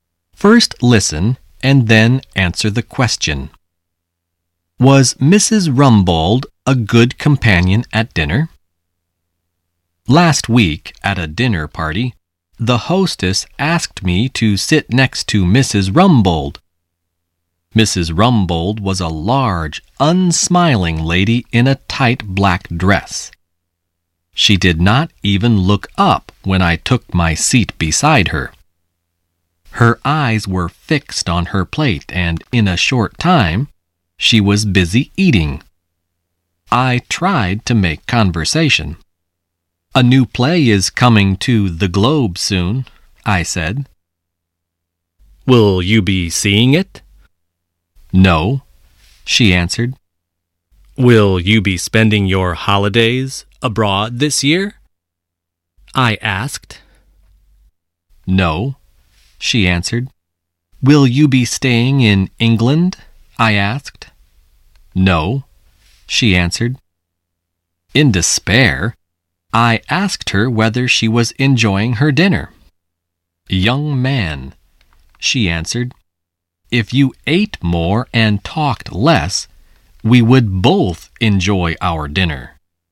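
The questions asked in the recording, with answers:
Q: Was Mrs. Rumbold a good companion at dinner?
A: No, she only wanted to eat and did not want to talk.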